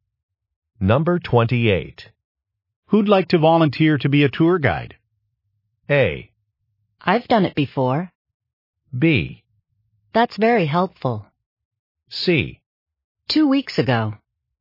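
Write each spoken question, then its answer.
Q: Who'd like to volunteer to be a tour guide?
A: A: I've done it before.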